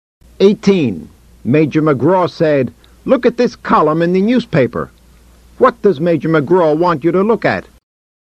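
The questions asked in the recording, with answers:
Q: What does Major McGraw want you to look at?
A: A column in the newspaper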